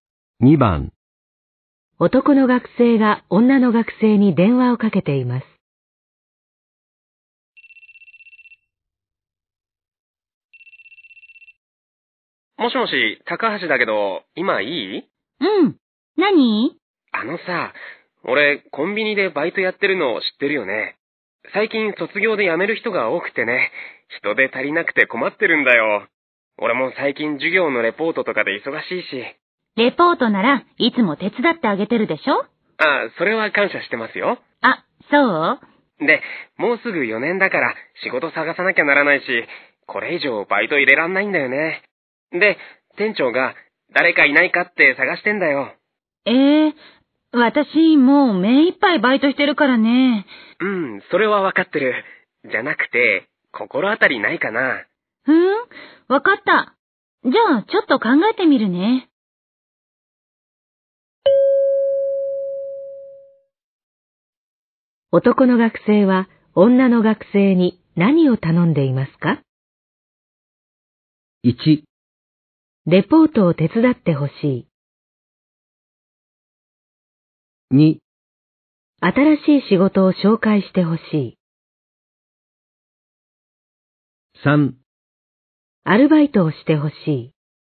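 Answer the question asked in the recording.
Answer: 4: アルバイトができる人を紹介してほしい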